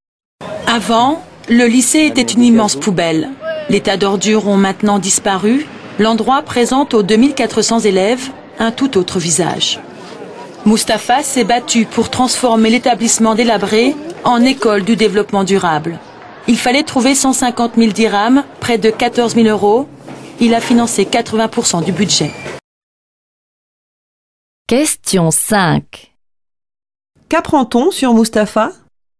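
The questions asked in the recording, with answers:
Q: Qu'apprend-on sur Mustapha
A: Il a financé 80% du budget pour transformer le lycée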